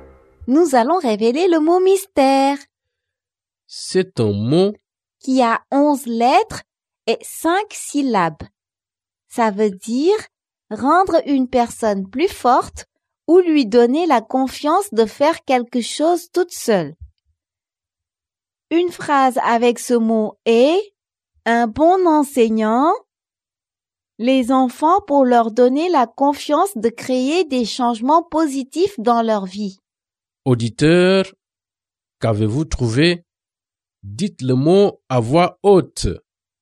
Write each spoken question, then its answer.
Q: Auditeur, qu'avez-vous trouvé?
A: Le mot mystère est autonomisé.